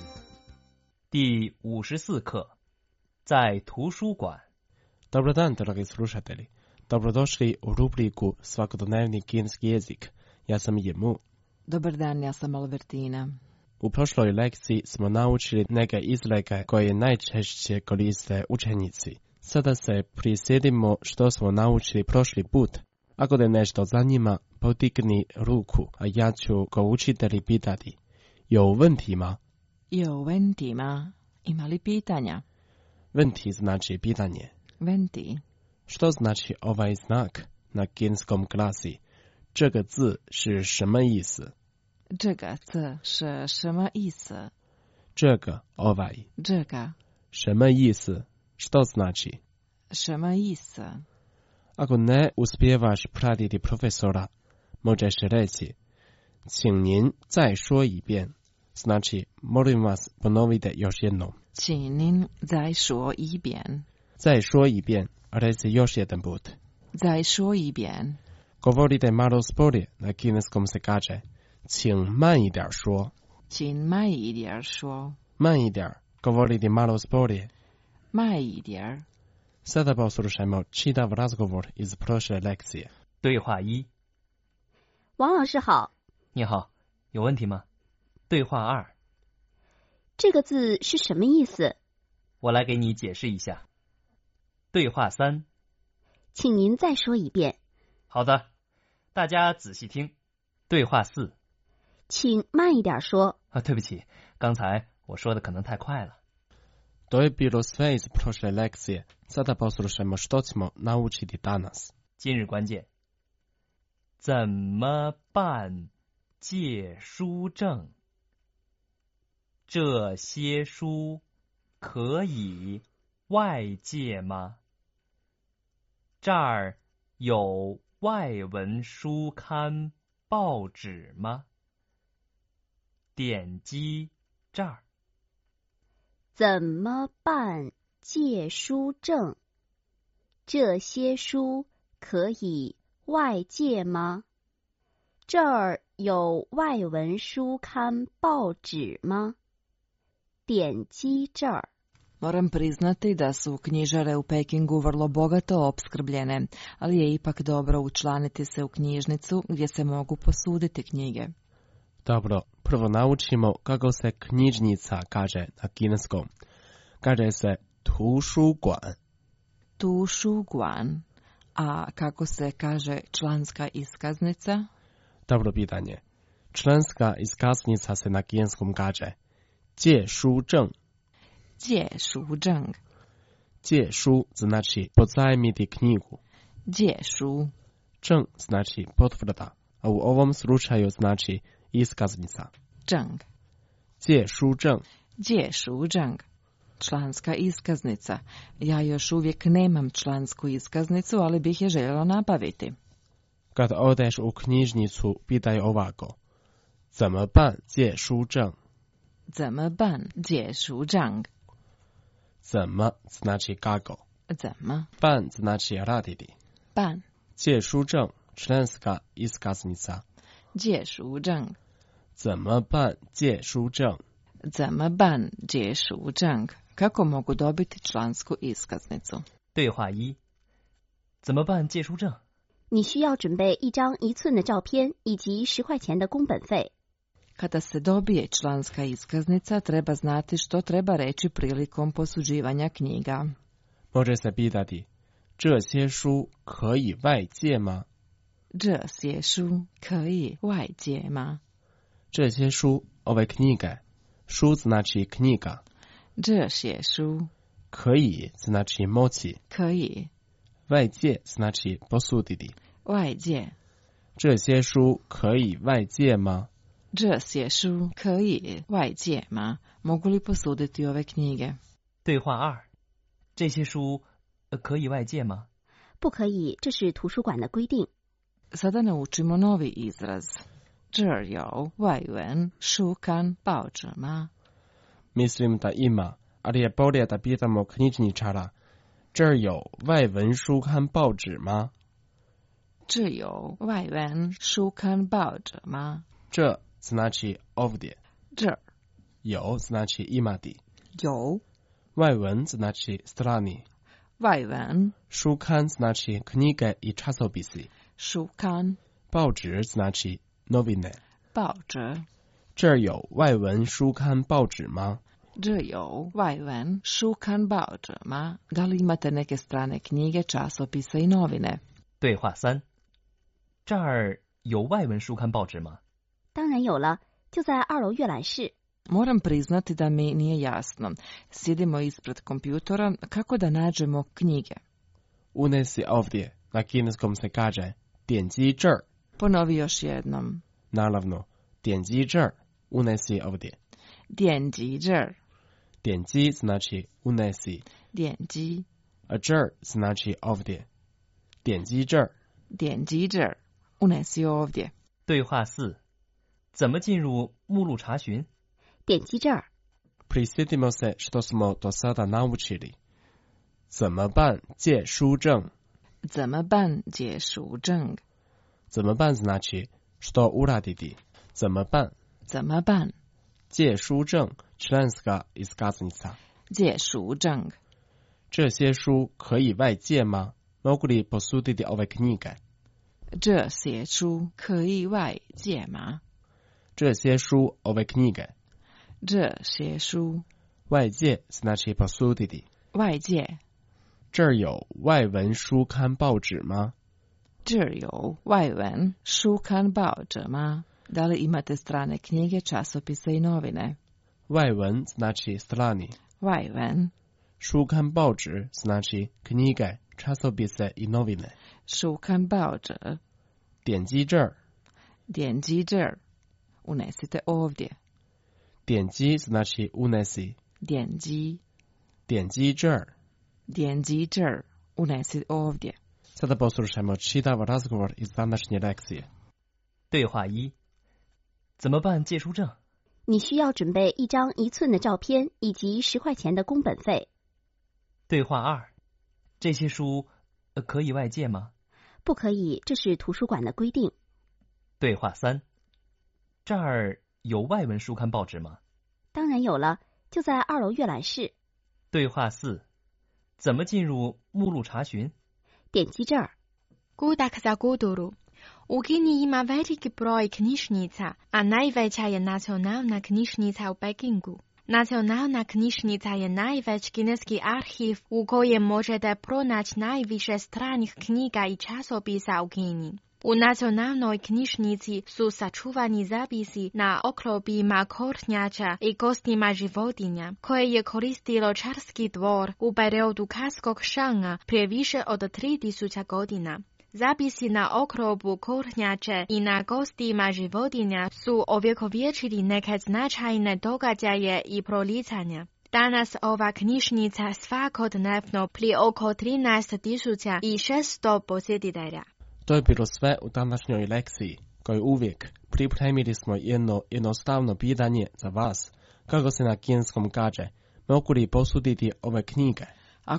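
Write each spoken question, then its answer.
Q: kako se na kineskom kaže, mogu li posuditi ove knjige?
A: 这些书可以外借吗?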